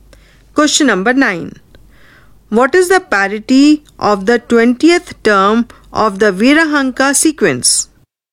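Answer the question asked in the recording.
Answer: Even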